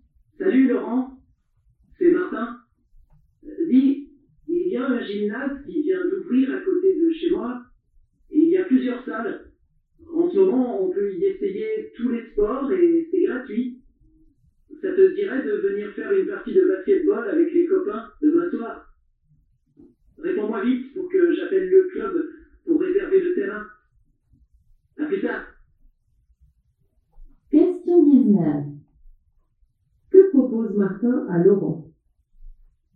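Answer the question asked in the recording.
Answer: De venir faire une partie de basketball avec les copains demain soir au nouveau gymnase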